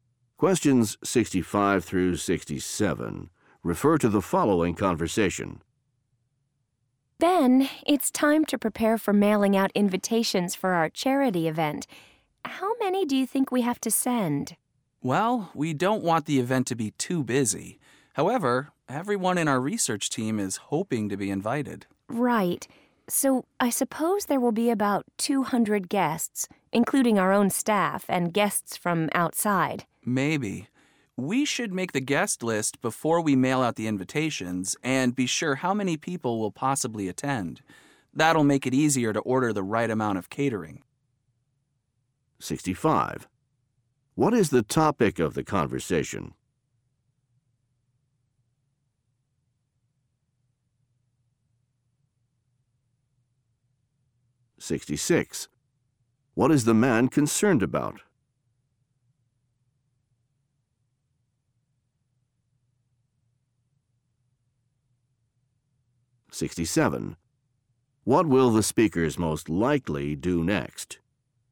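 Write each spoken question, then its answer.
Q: What is the topic of the conversation?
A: Sending invitations for a charity event

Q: What will the speakers most likely do next?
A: Make the guest list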